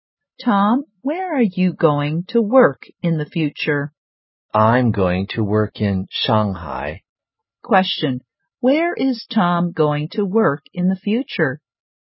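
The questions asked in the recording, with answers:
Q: Where is Tom going to work in the future?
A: In Shanghai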